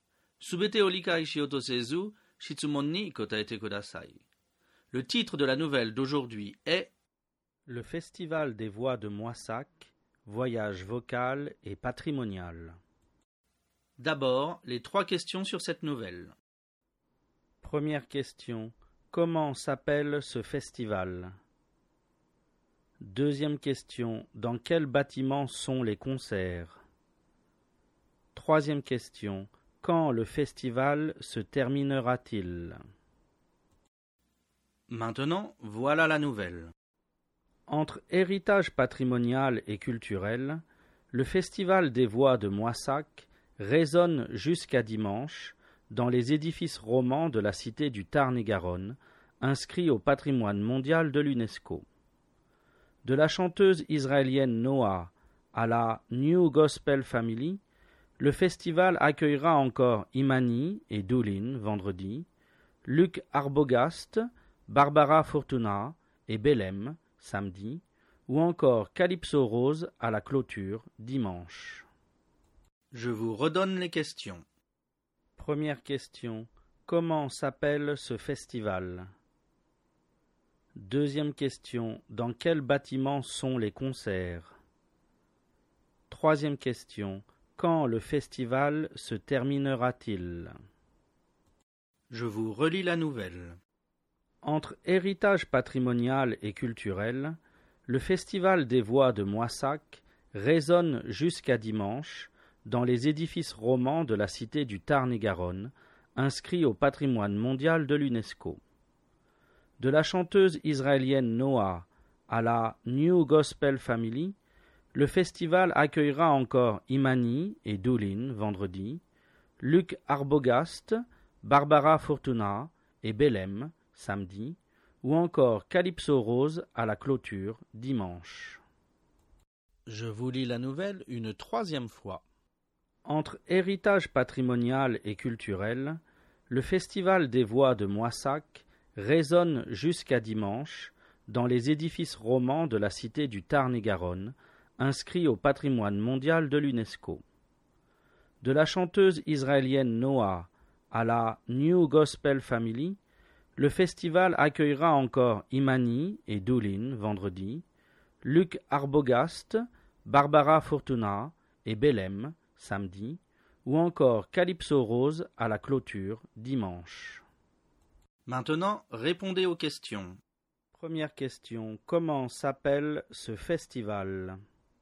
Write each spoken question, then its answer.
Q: Première question, comment s'appelle ce festival ?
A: Réponse, ce festival s'appelle le Festival des Voix de Moissac.

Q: Deuxième question, dans quel bâtiment sont les concerts?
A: Réponse, les concerts sont dans des édifices romans.

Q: Troisième question, quand le festival se terminera-t-il?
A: Réponse, le festival se terminera dimanche.